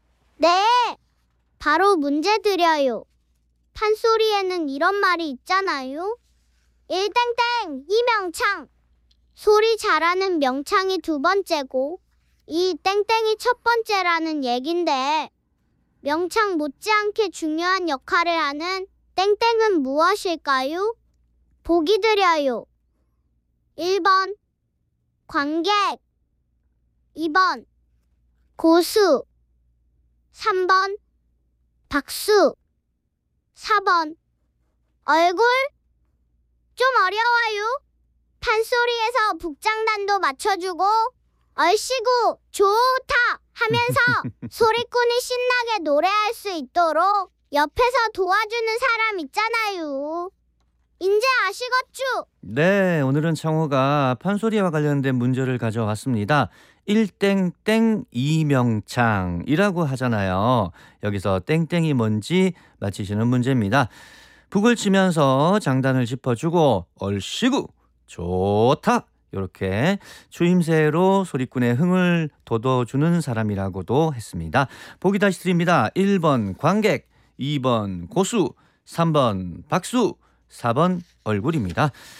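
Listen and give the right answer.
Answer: 2번: 고수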